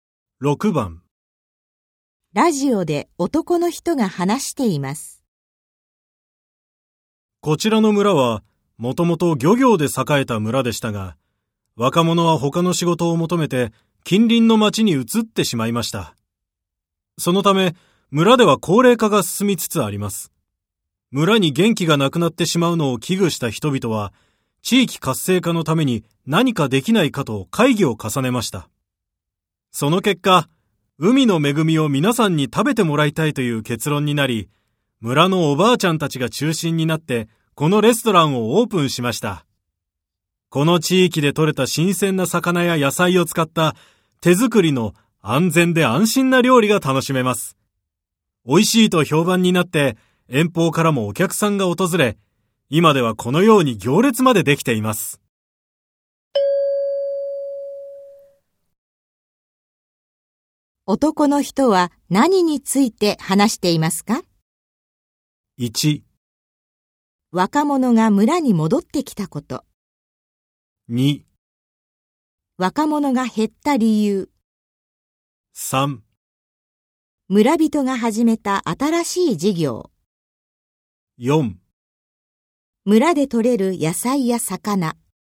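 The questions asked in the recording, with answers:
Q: 男の人は何について話していますか?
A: 3: 村人が始めた新しい事業。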